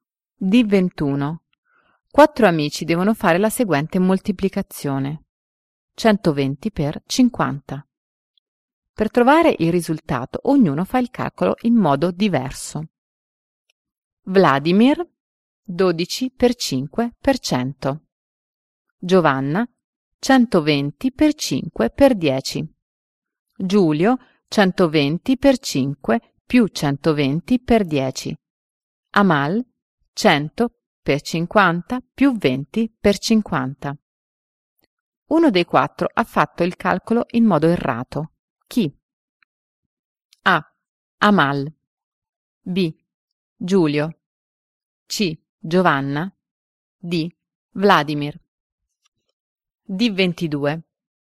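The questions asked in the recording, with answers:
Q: Uno dei quattro ha fatto il calcolo in modo errato.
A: B: Giulio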